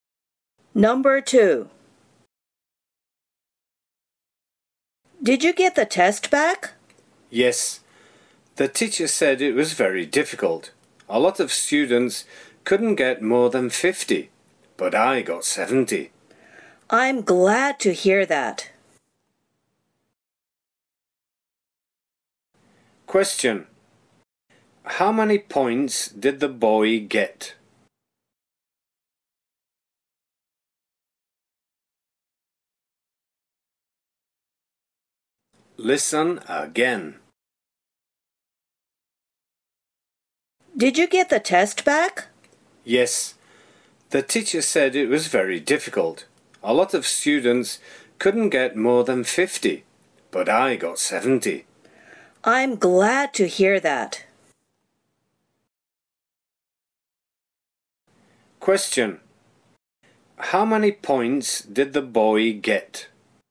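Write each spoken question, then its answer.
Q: How many points did the boy get?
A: 70 points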